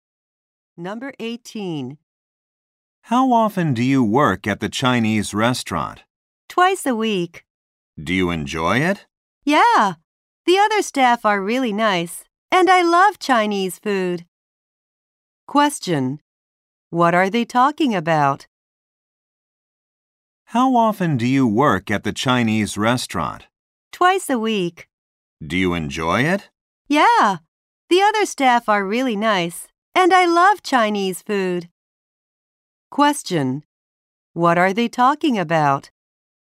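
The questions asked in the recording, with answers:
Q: What are they talking about?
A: A part-time job at a Chinese restaurant.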